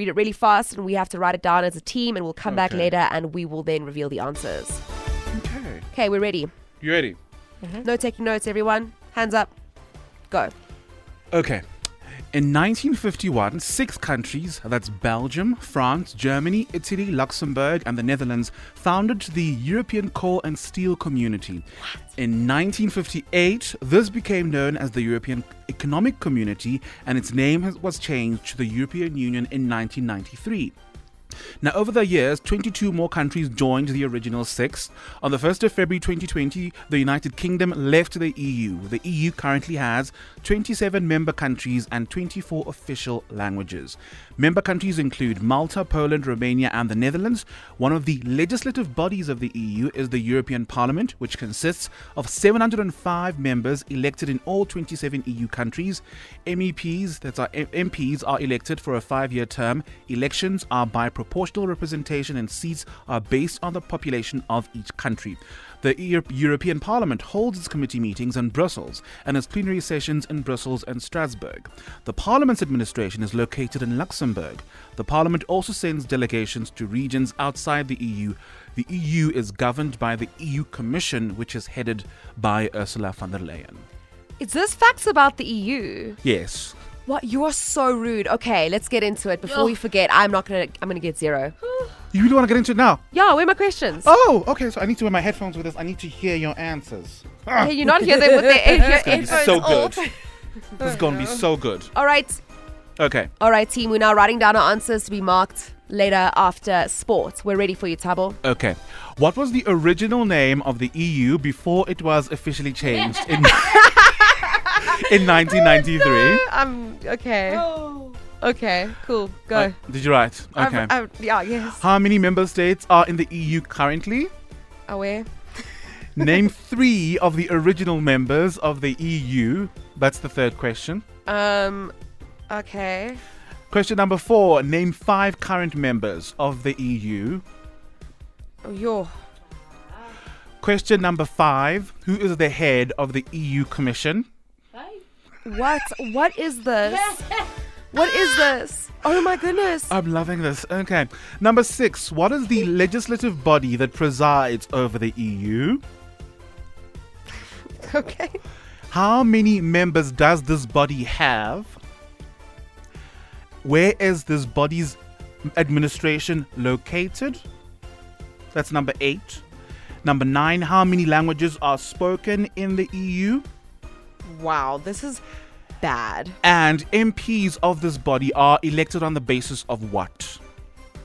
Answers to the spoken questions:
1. The answer is the European Coal and Steel Community.
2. 27.
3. That's Belgium, France, Italy, Germany, Luxembourg, and the Netherlands.
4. You could have said Germany, France, Italy.
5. No, Ursula von der Leyen.
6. Legislative, guys, European Parliament.
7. 705.
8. Luxembourg.
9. There you go, 24.
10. Elections are by proportional representation and seats are allocated on the basis of the member states' populations.